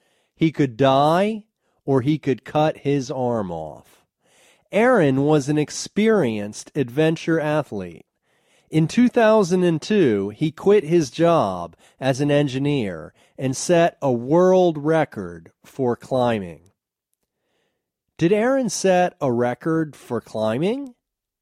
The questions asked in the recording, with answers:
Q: Did Aaron set a record for climbing?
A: Yes, he set a world record for climbing.